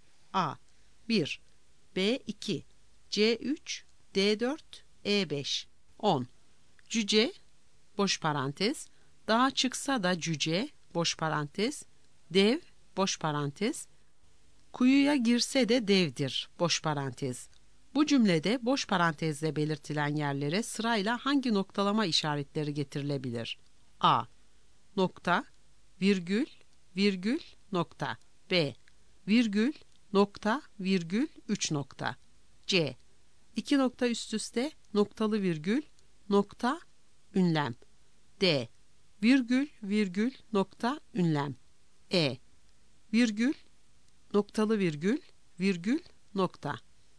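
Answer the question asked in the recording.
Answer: E: Virgül, noktalı virgül, virgül, nokta.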